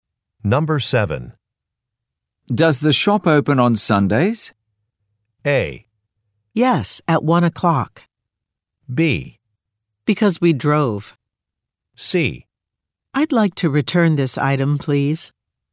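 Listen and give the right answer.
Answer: A: Yes, at 1 o'clock.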